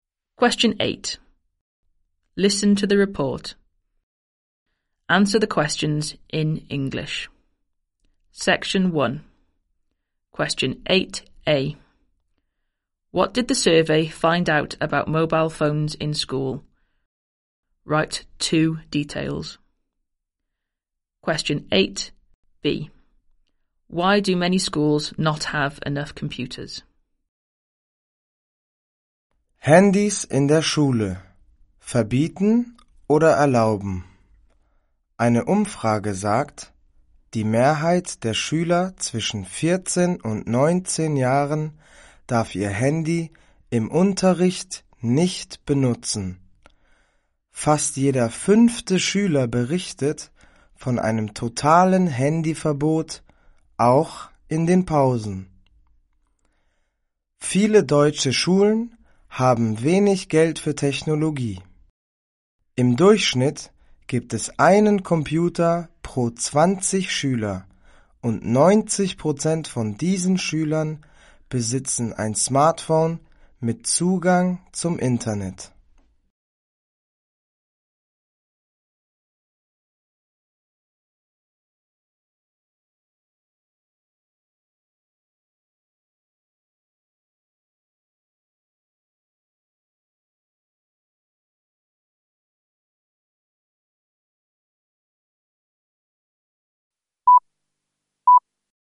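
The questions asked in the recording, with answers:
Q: What did the survey find out about mobile phones in school?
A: Most pupils aged 14-19 can't use phones in lessons; almost one in five has a total ban, even at break

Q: Why do many schools not have enough computers?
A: They have little money for technology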